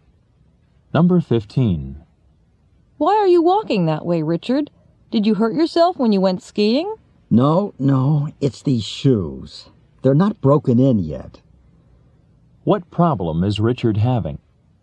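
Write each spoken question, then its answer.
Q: What problem is Richard having?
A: His new shoes aren't broken in yet and hurt.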